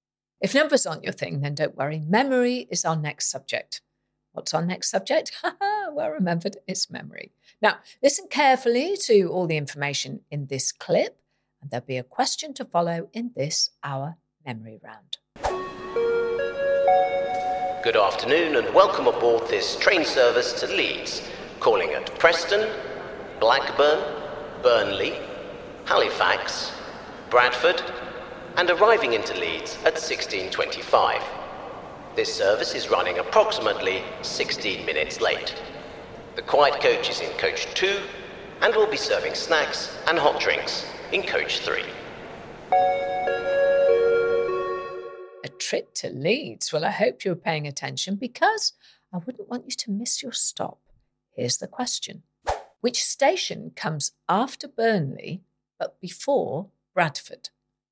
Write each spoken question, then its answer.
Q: Which station comes after Burnley but before Bradford?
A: And the answer was Halifax.